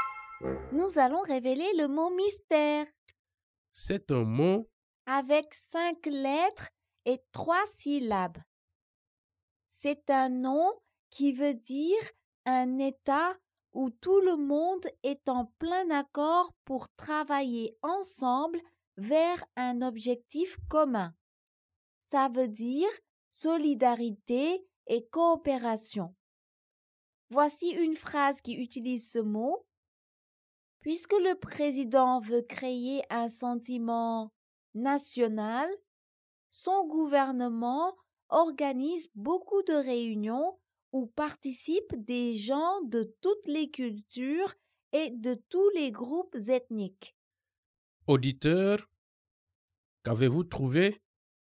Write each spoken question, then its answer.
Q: Auditeur, qu'avez-vous trouvé?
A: Le mot mystère est unité.